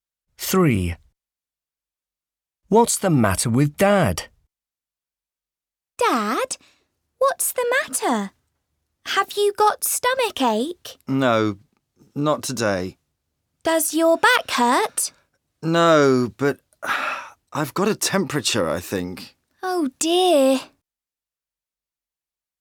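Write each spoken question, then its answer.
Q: What's the matter with Dad?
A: He has got a temperature.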